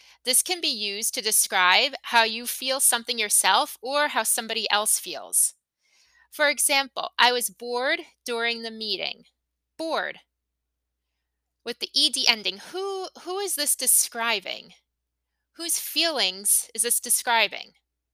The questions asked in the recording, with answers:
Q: Whose feelings is this describing?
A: It's describing mine.